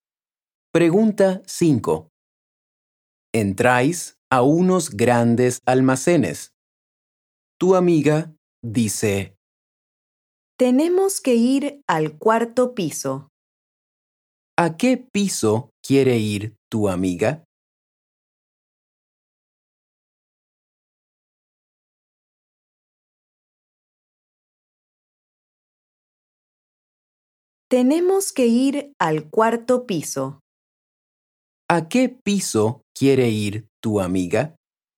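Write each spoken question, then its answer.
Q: ¿A qué piso quiere ir tu amiga?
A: al cuarto piso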